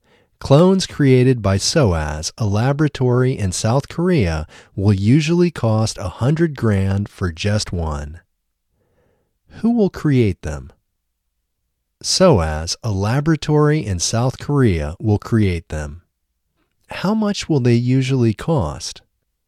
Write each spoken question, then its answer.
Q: How much will they usually cost?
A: They will usually cost $100,000 for just one.